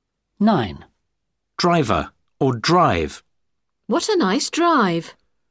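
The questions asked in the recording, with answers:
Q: Driver or drive.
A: drive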